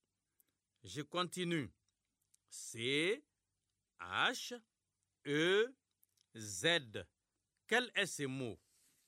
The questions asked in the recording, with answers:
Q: Quel est ce mot?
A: J'espère que vous avez trouvé chez.